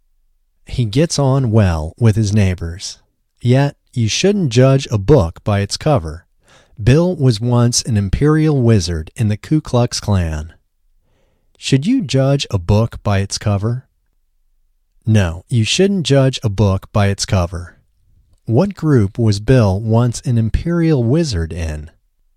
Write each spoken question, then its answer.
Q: What group was Bill once an imperial wizard in?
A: Bill was once an imperial wizard in the Ku Klux Klan.